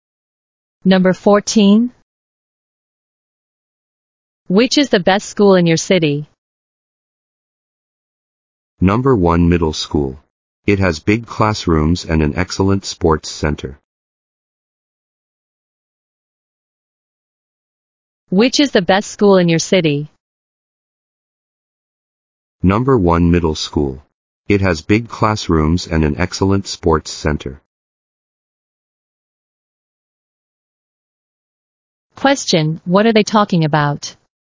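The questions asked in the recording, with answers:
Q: Question, what are they talking about?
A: The best school in their city.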